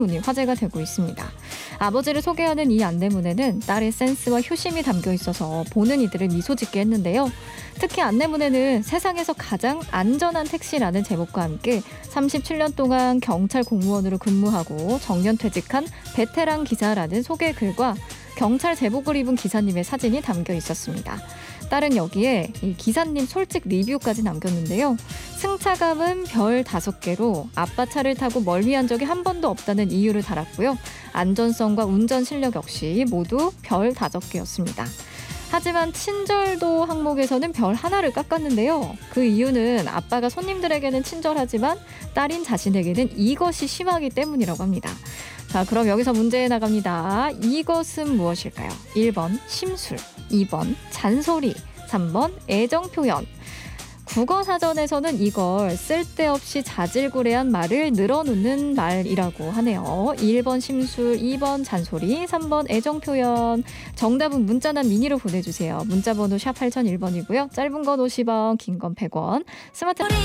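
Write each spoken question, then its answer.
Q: 이것은 무엇일까요?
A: 2: 잔소리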